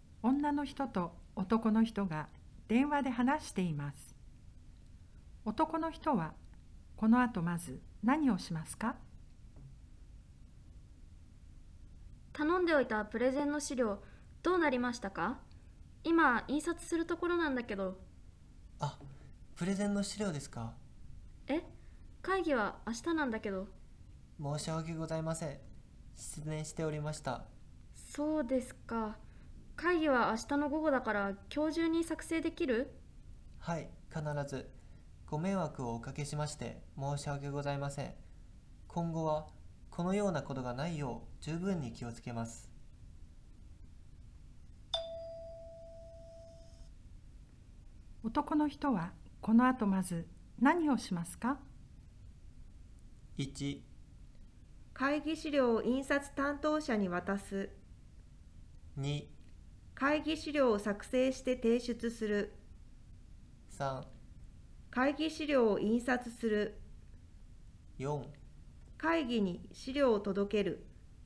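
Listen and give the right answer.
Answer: 2: 会議資料を作成して提出する。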